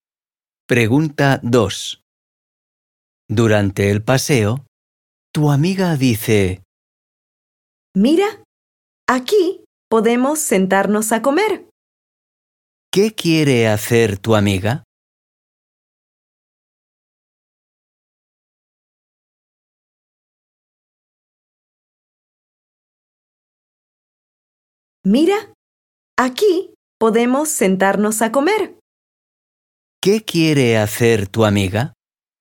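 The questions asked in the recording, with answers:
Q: ¿Qué quiere hacer tu amiga?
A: sentarse a comer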